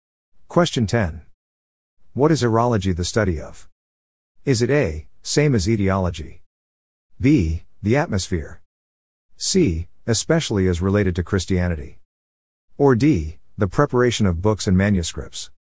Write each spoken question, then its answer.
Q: What is aerology the study of?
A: The answer is B. The atmosphere.